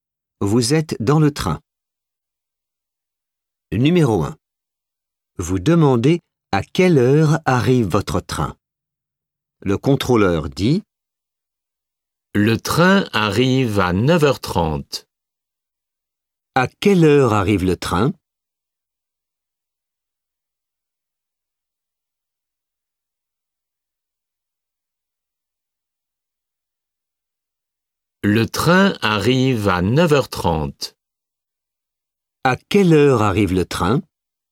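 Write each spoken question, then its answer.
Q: À quelle heure arrive le train ?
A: À 9h30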